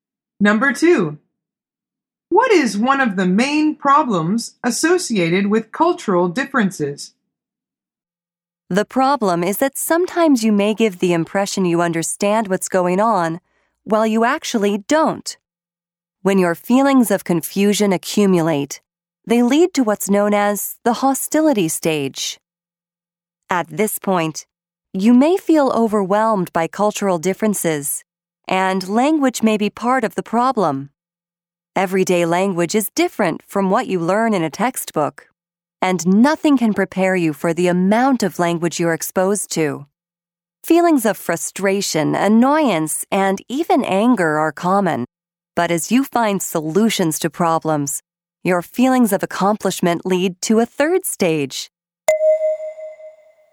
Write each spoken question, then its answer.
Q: What is one of the main problems associated with cultural differences?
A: The answer is language.